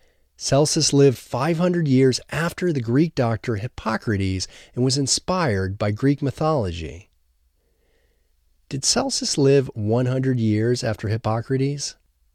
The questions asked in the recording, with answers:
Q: Did Celsus live 100 years after Hippocrates?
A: No, Celsus lived 500 years after Hippocrates.